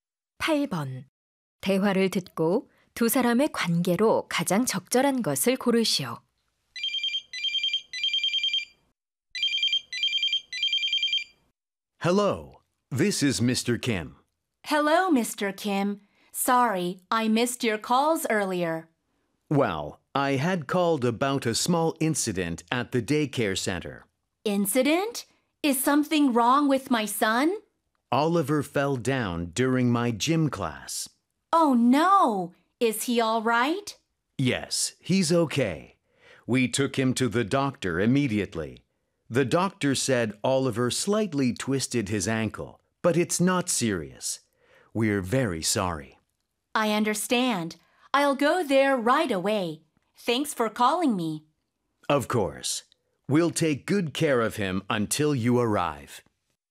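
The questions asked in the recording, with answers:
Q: 대화를 듣고 두 사람의 관계로 가장 적절한 것을 고르시오.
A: 학부모 – 어린이집 체육 교사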